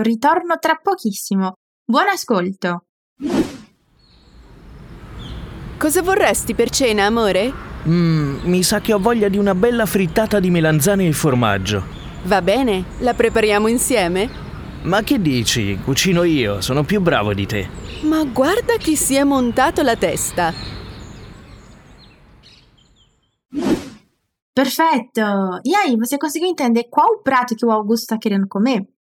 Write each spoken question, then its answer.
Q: você conseguiu entender qual o prato que o Augusto está querendo comer?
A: Hum, acho que eu estou com vontade de uma bela fritada de berinjela e queijo.